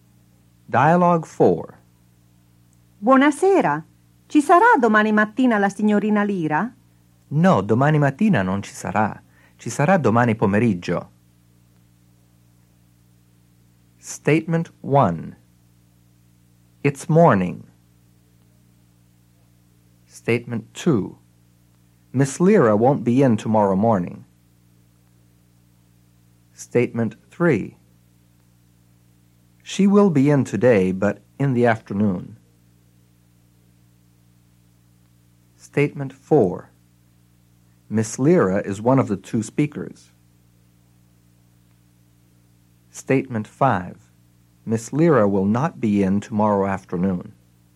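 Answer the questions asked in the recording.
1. False
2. True
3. False
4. False
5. False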